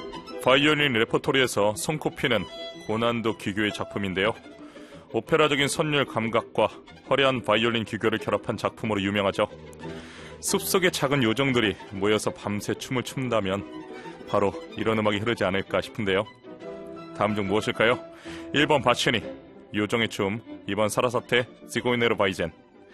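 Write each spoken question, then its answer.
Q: 다음 중 무엇일까요? 1번 바치니, 요정의 춤, 2번 사라사테, 시고이네르 바이젠.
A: 1: 바치니, 요정의 춤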